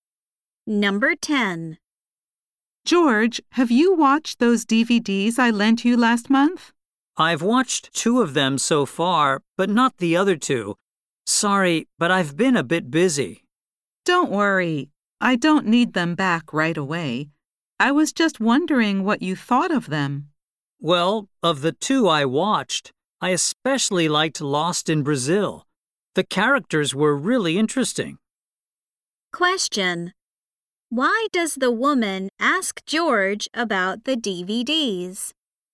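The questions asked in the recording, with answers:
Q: Why does the woman ask George about the DVDs?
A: She wants to know what he thought of them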